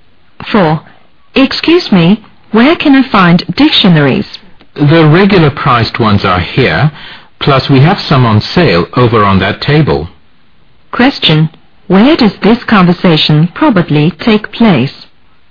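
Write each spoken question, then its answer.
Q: Where does this conversation probably take place?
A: In a bookstore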